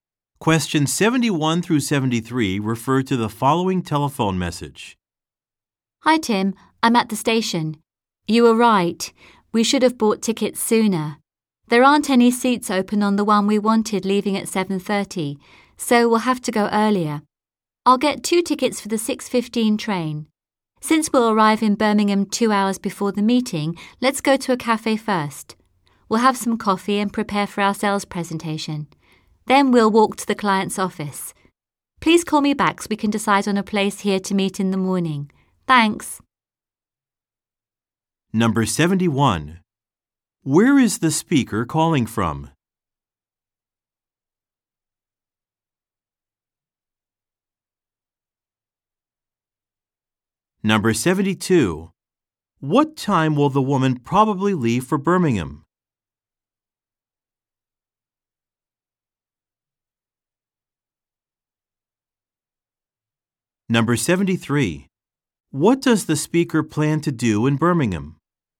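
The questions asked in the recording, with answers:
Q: Where is the speaker calling from?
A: The train station

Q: What time will the woman probably leave for Birmingham?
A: 6:15

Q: What does the speaker plan to do in Birmingham?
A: Go to a cafe to prepare for the sales presentation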